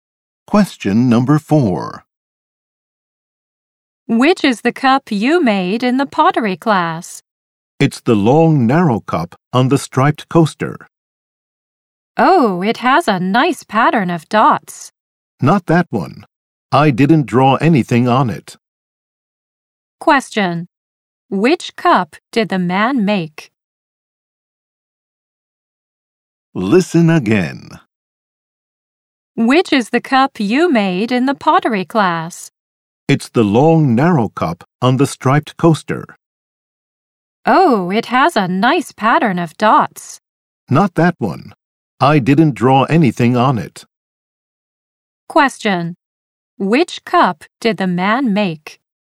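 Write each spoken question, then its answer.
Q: Which cup did the man make?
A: The long, narrow, plain cup with no drawing, on the striped coaster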